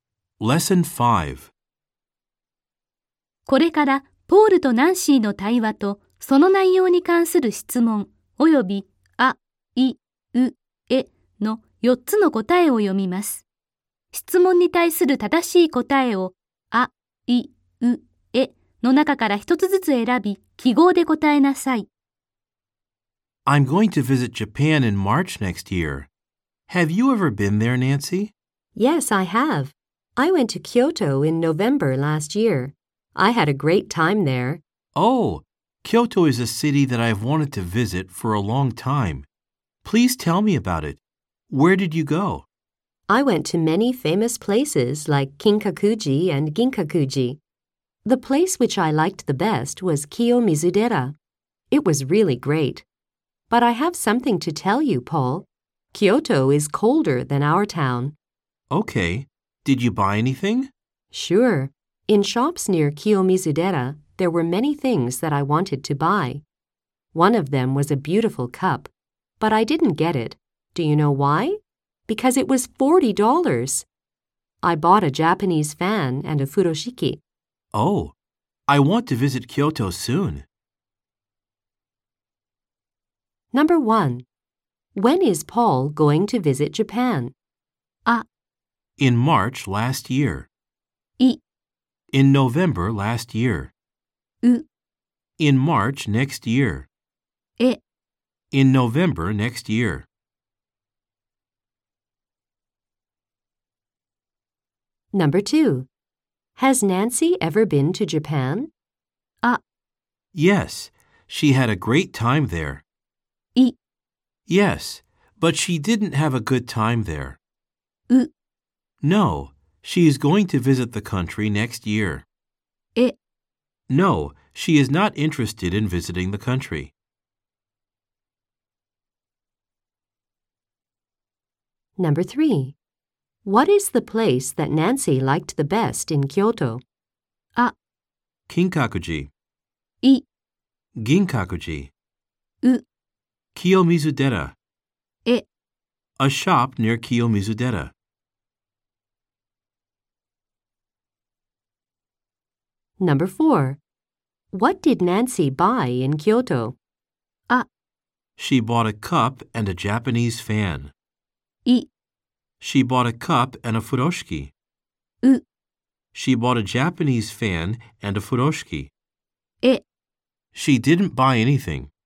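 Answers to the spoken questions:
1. う: In March next year.
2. あ: Yes, she had a great time there.
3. う: Kiyomizudera.
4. う: She bought a Japanese fan and a furoshiki.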